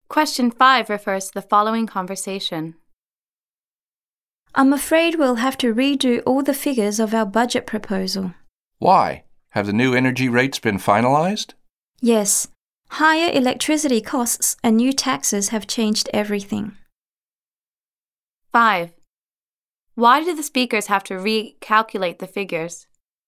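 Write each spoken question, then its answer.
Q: Why do the speakers have to recalculate the figures?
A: Because higher electricity costs and new taxes changed the budget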